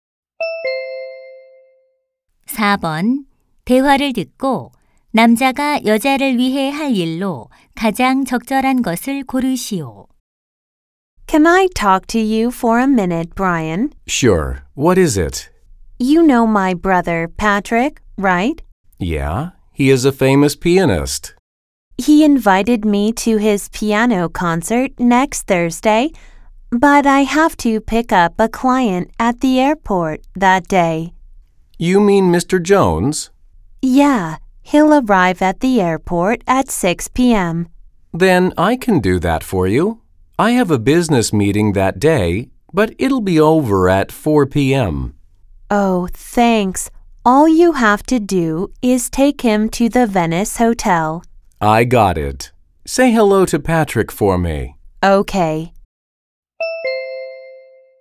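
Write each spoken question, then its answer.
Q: 대화를 듣고 남자가 여자를 위해 할 일로 가장 적절한 것을 고르시오.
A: 공항에서 고객(Mr. Jones)을 태워 호텔에 데려다주기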